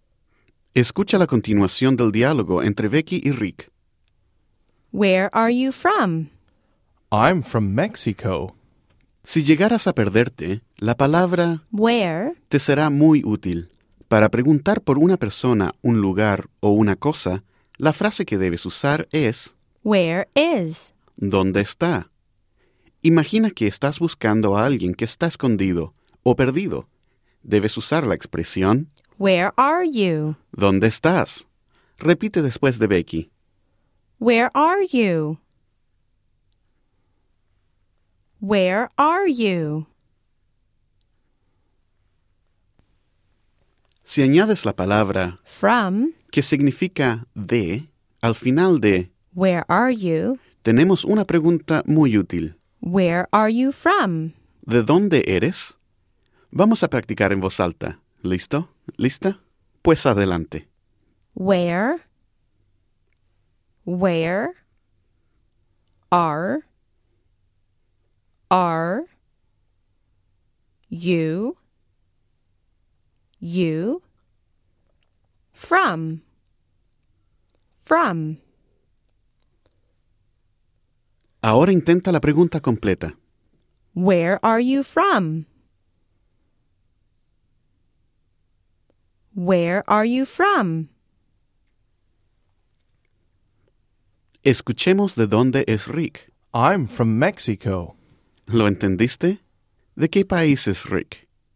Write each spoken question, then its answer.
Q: ¿De qué país es Rick?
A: Si dijiste México, pues estás en lo correcto.